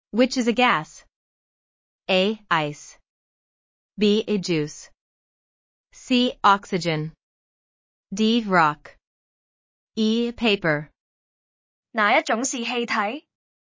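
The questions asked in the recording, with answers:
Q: Which is a gas?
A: C: Oxygen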